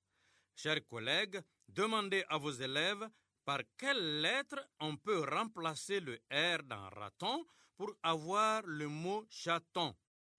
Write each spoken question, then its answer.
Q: Chers collègues, demandez à vos élèves par quelle lettre on peut remplacer le R dans raton pour avoir le mot chaton.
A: Dans raton, on remplace R par Ch pour avoir chaton.